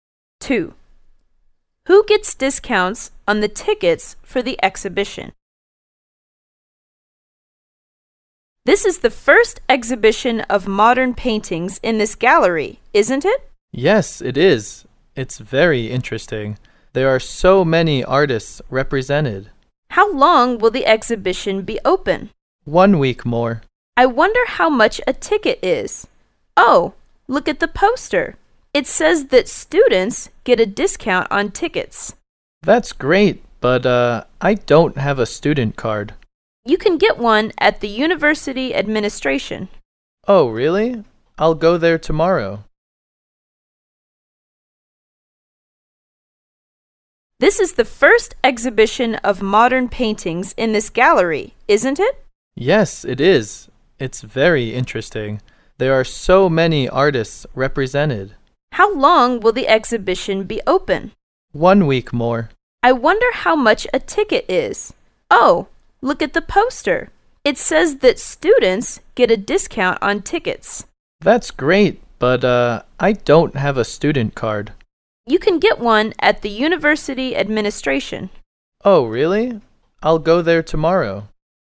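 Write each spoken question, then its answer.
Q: Who gets discounts on the tickets for the exhibition?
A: Students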